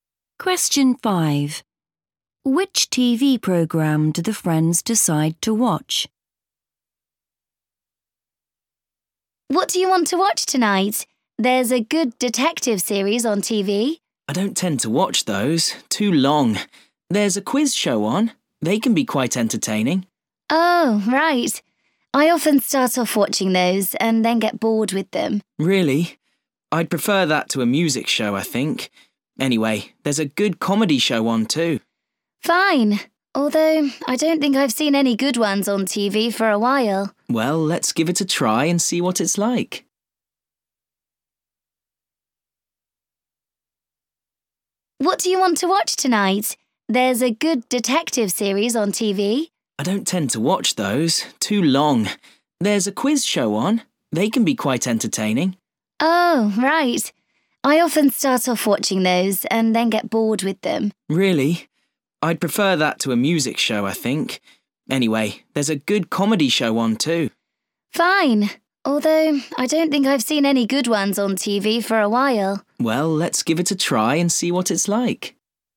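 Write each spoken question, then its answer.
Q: Which TV program do the friends decide to watch?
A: a comedy show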